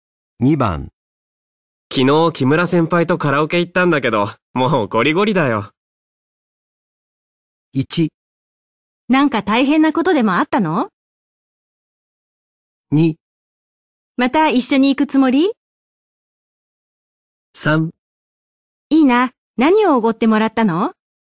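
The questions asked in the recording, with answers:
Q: 昨日木村先輩とカラオケ行ったんだけど、もうゴリゴリだよ。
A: 1: なんか大変なことでもあったの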